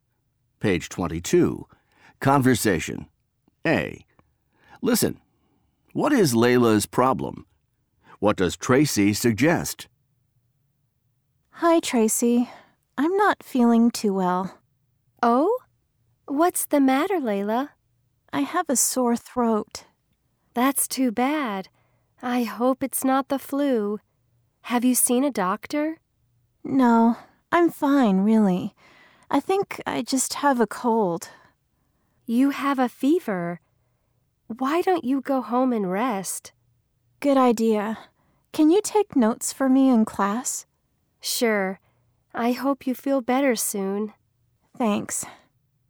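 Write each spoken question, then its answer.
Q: What is Layla's problem?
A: She has a sore throat (and a fever).

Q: What does Tracy suggest?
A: She suggests Layla go home and rest.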